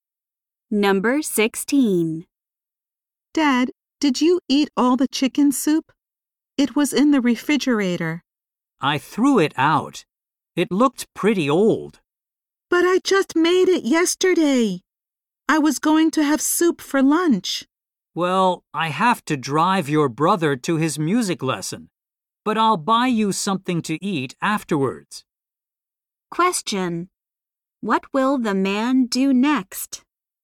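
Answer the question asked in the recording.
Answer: Drive his son to his music lesson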